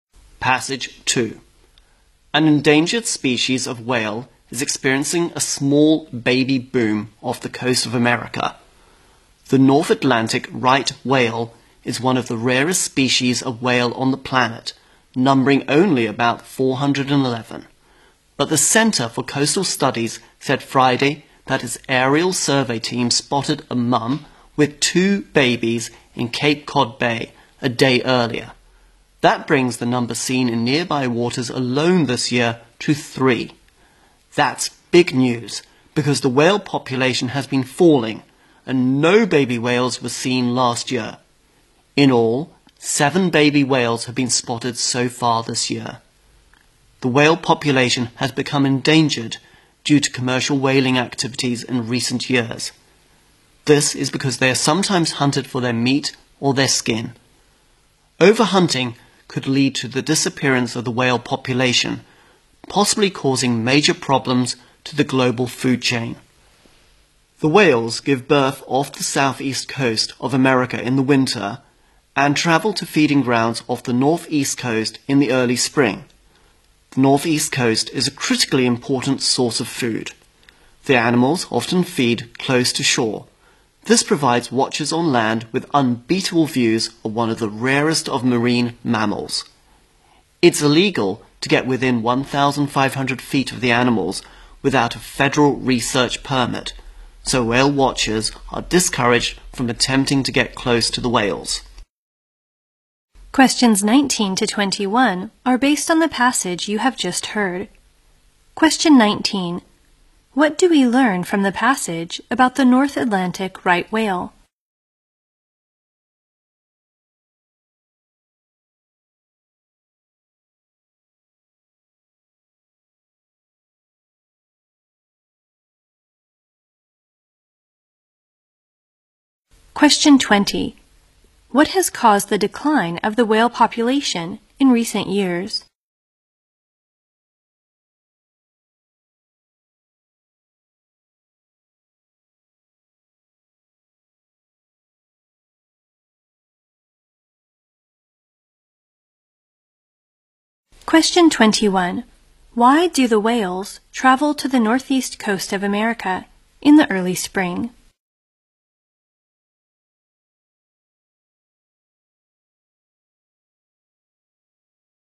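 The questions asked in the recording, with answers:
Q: What do we learn from the passage about the North Atlantic right whale?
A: It is one of the rarest whale species, numbering about 411

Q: What has caused the decline of the whale population in recent years?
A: Commercial whaling

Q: Why do the whales travel to the northeast coast of America in the early spring?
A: To feed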